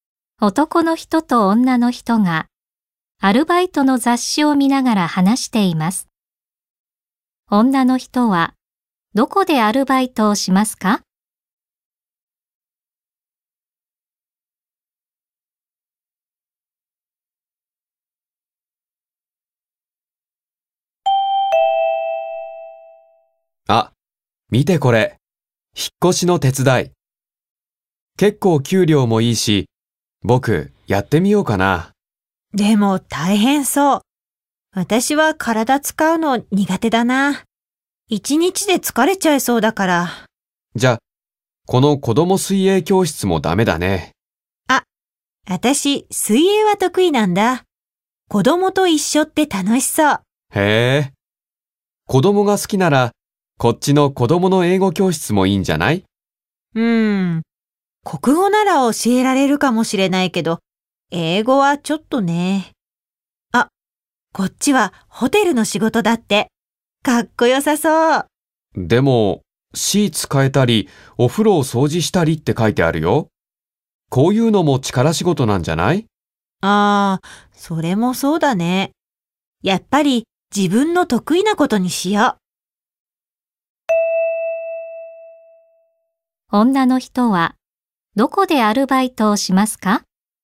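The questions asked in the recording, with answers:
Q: 女の人は、どこでアルバイトをしますか?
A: 子供の水泳教室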